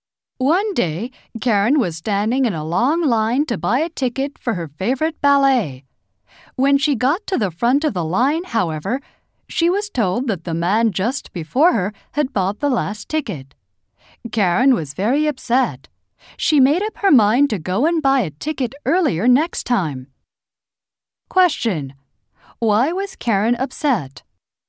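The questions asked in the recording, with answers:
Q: Why was Karen upset?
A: The last ballet ticket was sold to the man before her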